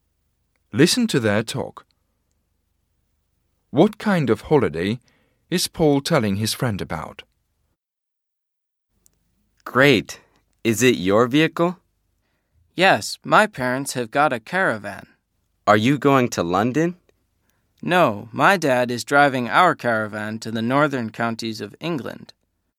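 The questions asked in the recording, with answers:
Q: What kind of holiday is Paul telling his friend about?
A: A caravan holiday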